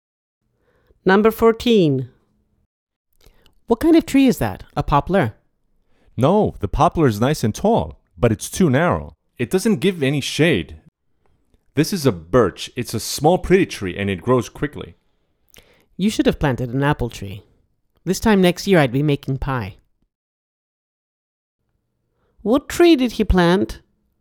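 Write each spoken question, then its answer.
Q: What tree did he plant?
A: A birch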